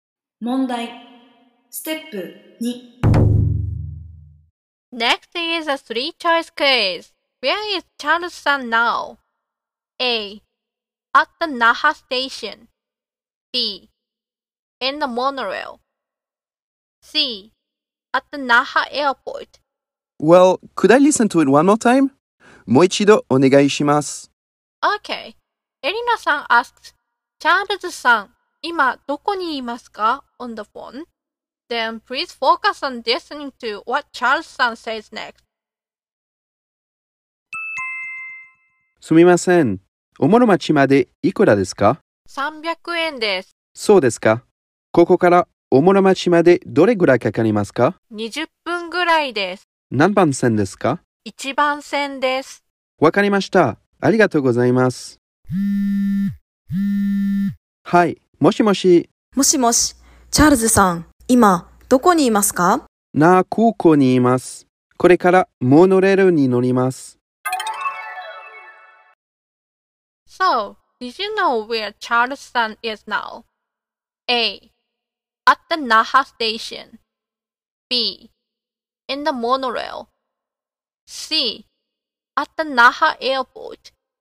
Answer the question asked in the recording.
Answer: So the answer is C.